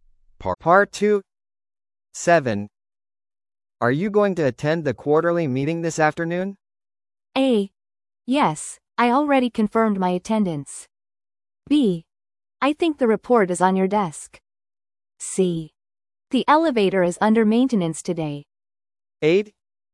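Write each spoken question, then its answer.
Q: Are you going to attend the quarterly meeting this afternoon?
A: A: Yes, I already confirmed my attendance.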